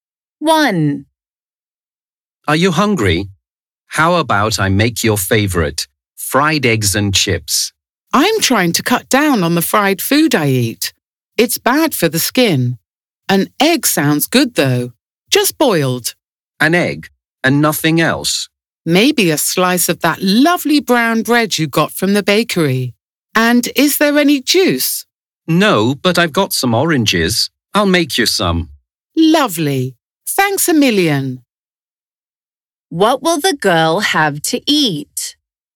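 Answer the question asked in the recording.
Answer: A boiled egg, brown bread and orange juice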